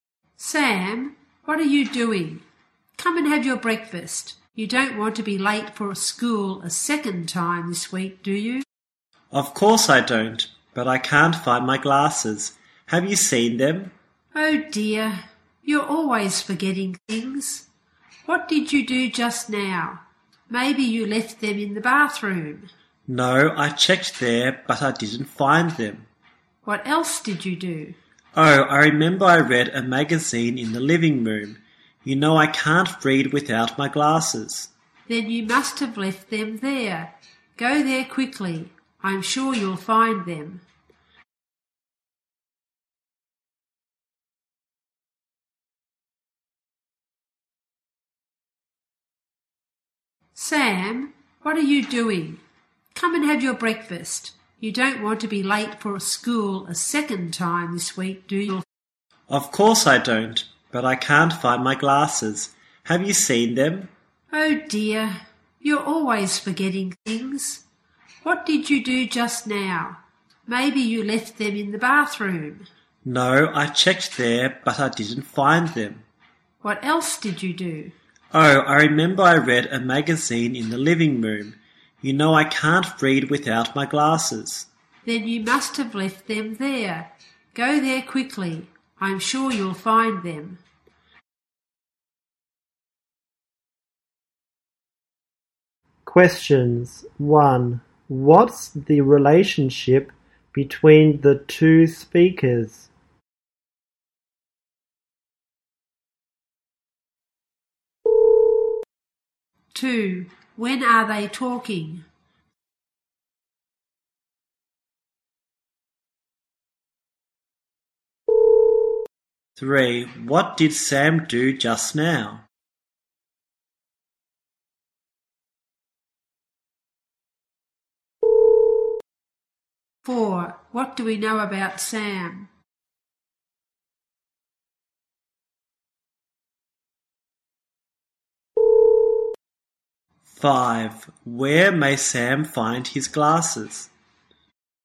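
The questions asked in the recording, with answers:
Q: When are they talking?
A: In the morning, before breakfast.

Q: What did Sam do just now?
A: He read a magazine in the living room.

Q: Where may Sam find his glasses?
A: In the living room.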